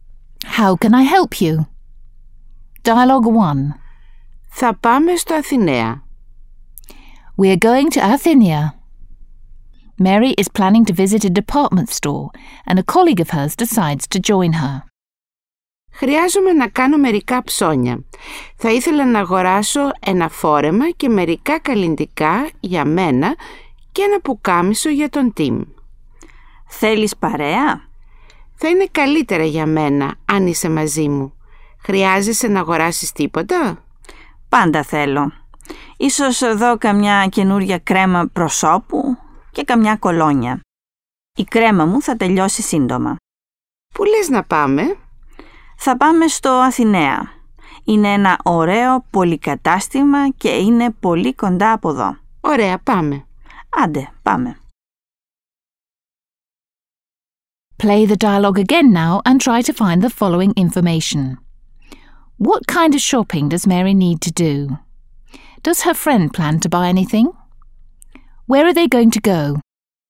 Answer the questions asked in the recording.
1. Mary needs to buy a dress and some cosmetics for herself and a shirt for Tim.
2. Her friend might buy a face cream and a perfume.
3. They're planning to go to Athenaea, a department store in Athens.